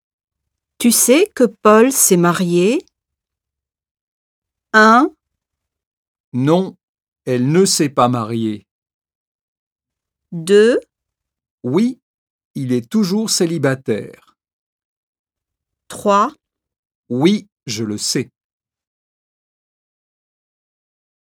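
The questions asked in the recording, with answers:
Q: Tu sais que Paul s'est marié?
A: 3: Oui, je le sais.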